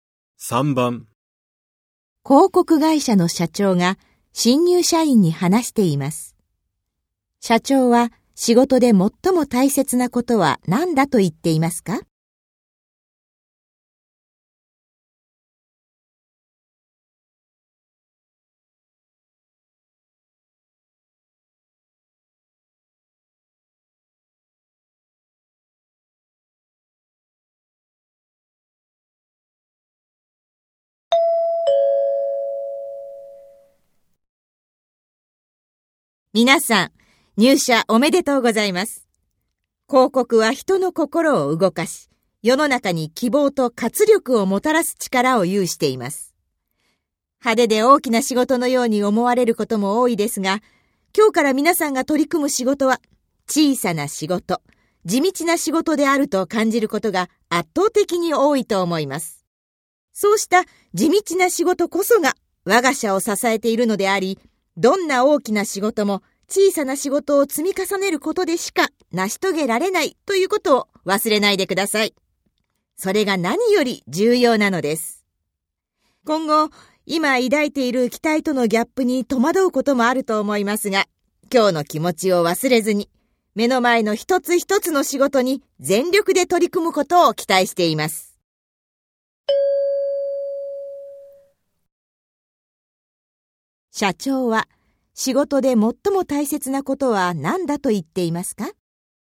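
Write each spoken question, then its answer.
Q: 社長は仕事で最も大切なことは何だと言っていますか?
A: 小さな地道な仕事を積み重ねること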